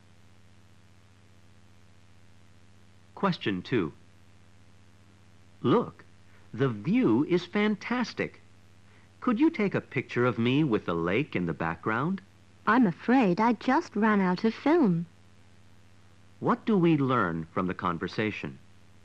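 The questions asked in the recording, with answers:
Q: What do we learn from the conversation?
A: The woman can't take a picture because she has run out of film.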